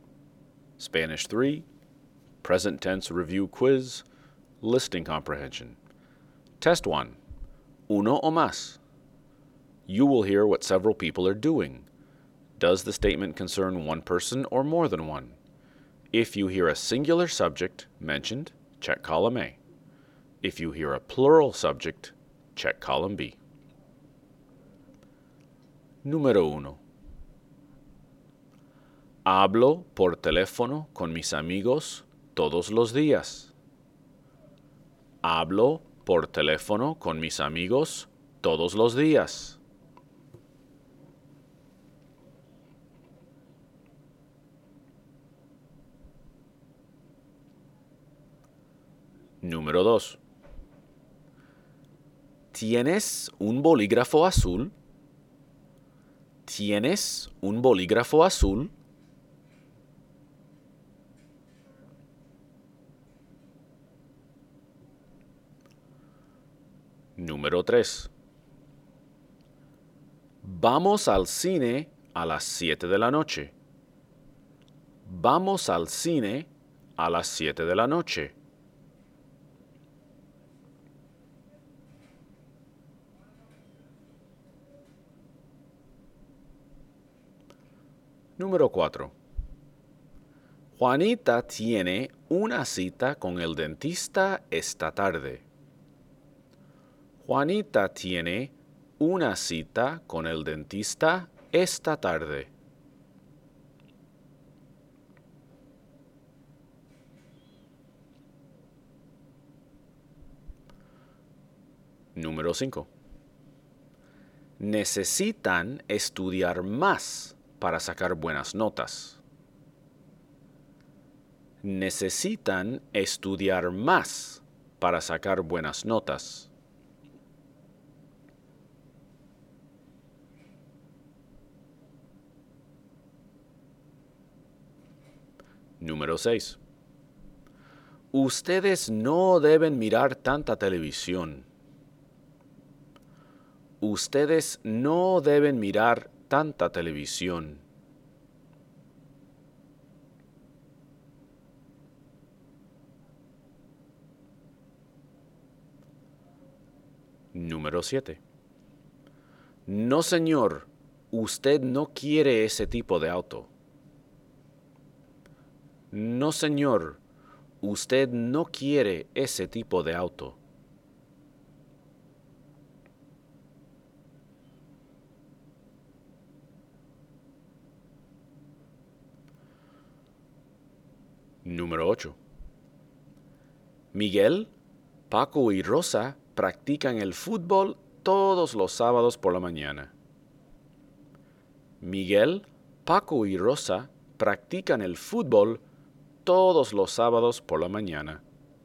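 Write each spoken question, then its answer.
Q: Hablo por teléfono con mis amigos todos los días.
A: A: one person (singular)

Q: ¿Tienes un bolígrafo azul?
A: A: one person (singular)

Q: Vamos al cine a las 7 de la noche.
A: B: more than one (plural)

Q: Juanita tiene una cita con el dentista esta tarde.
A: A: one person (singular)

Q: Necesitan estudiar más para sacar buenas notas.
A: B: more than one (plural)

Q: Ustedes no deben mirar tanta televisión.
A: B: more than one (plural)

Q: No, señor, usted no quiere ese tipo de auto.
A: A: one person (singular)

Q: Miguel, Paco y Rosa practican el fútbol todos los sábados por la mañana.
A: B: more than one (plural)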